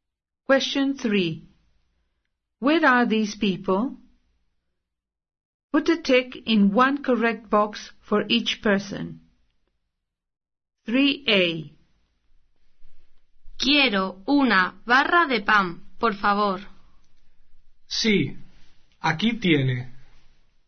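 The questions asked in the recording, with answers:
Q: Where are these people?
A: At the baker's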